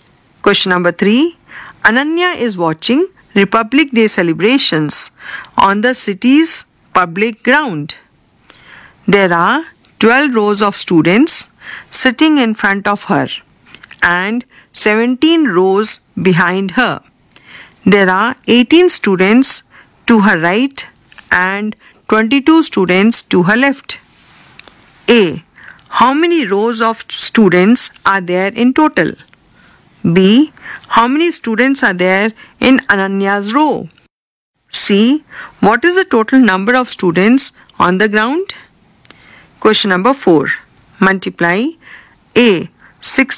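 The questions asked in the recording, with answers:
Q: How many rows of students are there in total?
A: 30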